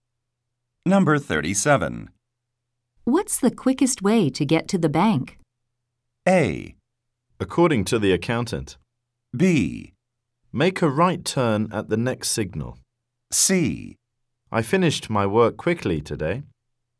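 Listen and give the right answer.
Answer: B: Make a right turn at the next signal.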